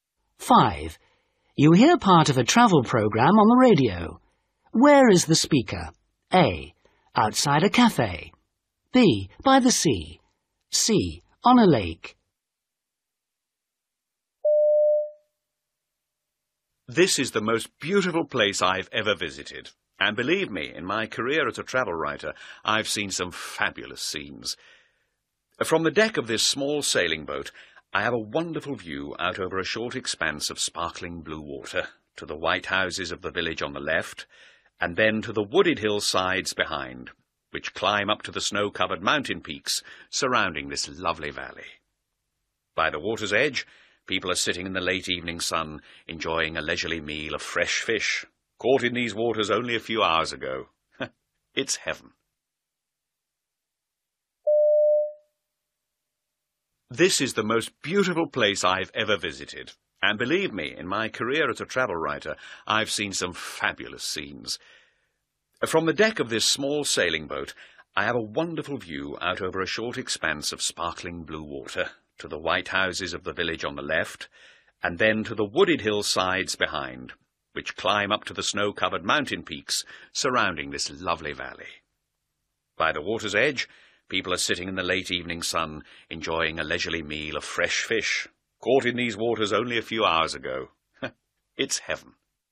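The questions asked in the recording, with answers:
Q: Where is the speaker?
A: C: On a lake.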